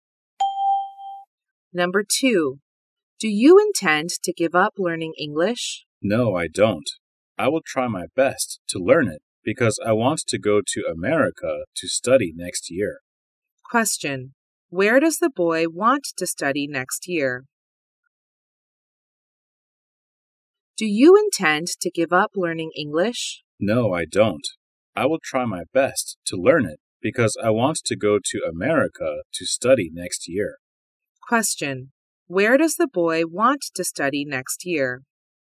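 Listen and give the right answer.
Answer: In America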